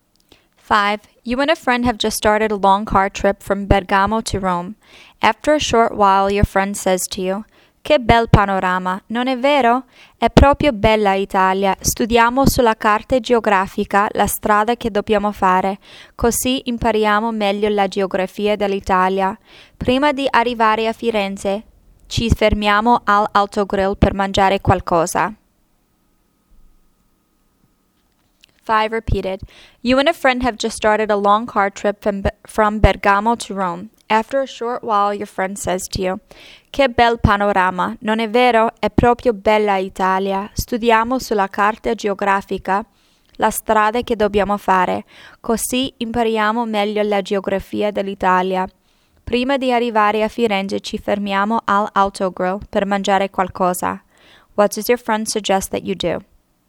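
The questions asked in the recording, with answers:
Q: What does your friend suggest that you do?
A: Study the route on the map to learn Italy's geography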